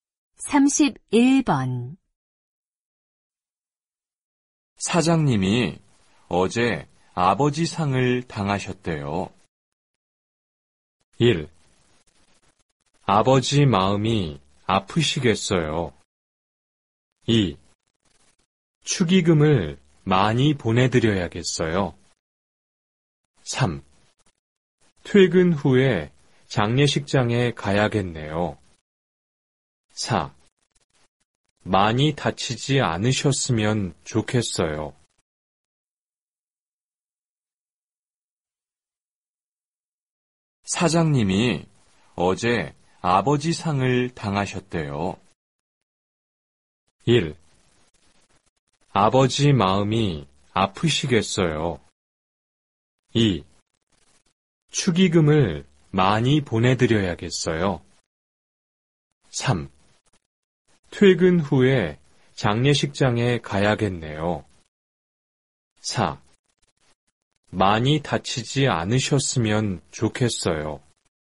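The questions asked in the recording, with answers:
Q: 사장님이 어제 아버지 상을 당하셨대요.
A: 3: 퇴근 후에 장례식장에 가야겠네요.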